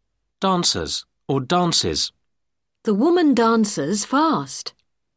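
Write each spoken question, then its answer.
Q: Dancers or dances.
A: dances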